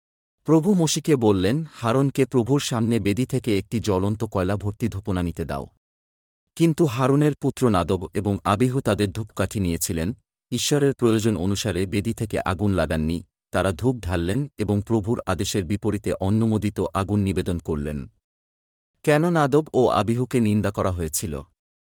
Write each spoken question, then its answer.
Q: কেন Nadav ও আবিহুকে নিন্দা করা হয়েছিল?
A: তারা তাদের ধূপকাঠিতে আগুন লাগাওয়া ঈশ্বরের নির্দেশ অনুসারে বেদী থেকে ছিল না।